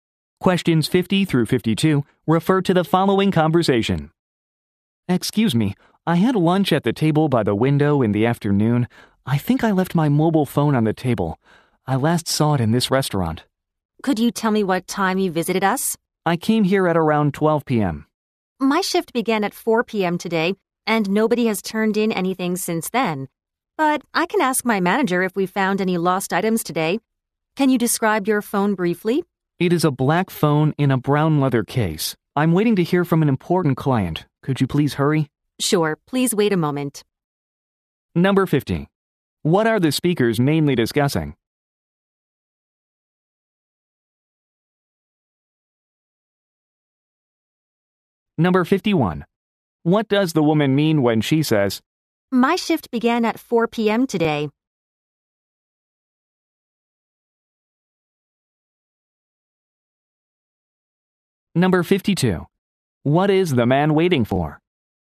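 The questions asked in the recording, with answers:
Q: What are the speakers mainly discussing?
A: A lost mobile phone

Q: What does the woman mean when she says, My shift began at 4 p.m. today.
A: She wasn't there when he visited and doesn't know

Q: What is the man waiting for?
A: A call from an important client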